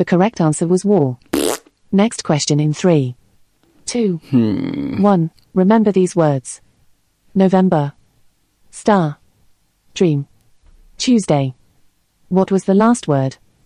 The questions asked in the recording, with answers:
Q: What was the last word?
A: The answer was Tuesday.